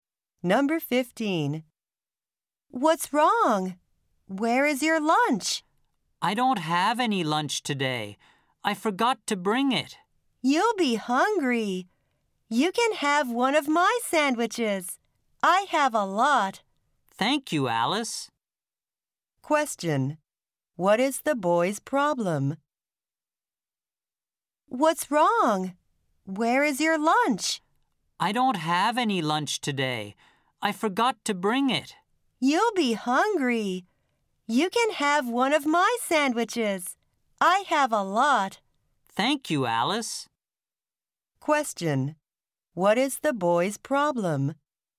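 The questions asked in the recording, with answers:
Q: What is the boy's problem?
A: He forgot to bring his lunch.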